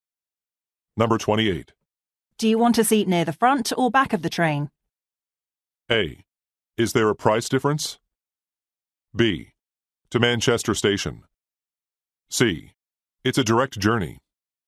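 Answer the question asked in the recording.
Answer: A: Is there a price difference?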